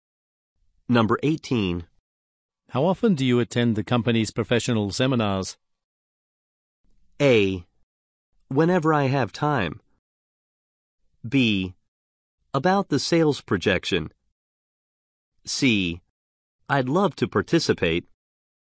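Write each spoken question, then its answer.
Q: How often do you attend the company's professional seminars?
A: A: Whenever I have time.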